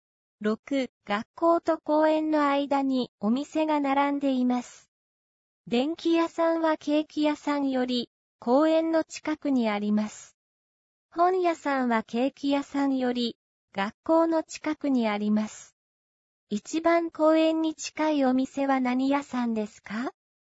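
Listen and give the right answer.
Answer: 電気屋さん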